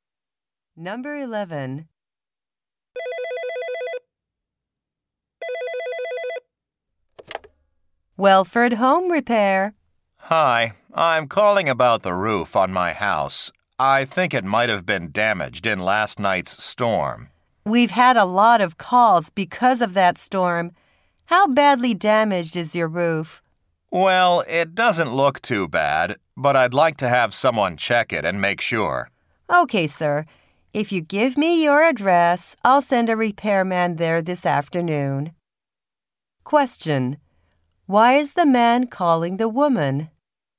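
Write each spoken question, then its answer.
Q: Why is the man calling the woman?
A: To have someone check his roof for storm damage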